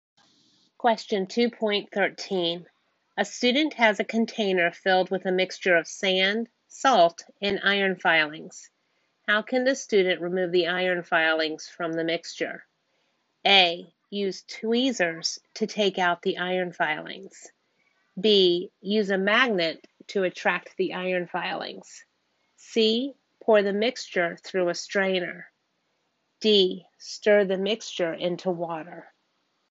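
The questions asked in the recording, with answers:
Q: How can the student remove the iron filings from the mixture?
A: B: Use a magnet to attract the iron filings.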